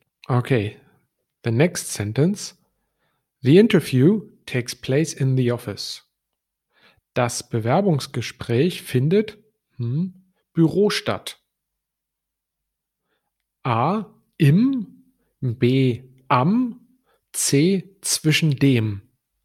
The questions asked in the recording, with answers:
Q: Das Bewerbungsgespräch findet hm, Büro statt.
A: And the right answer is, das Bewerbungsgespräch findet im Büro statt.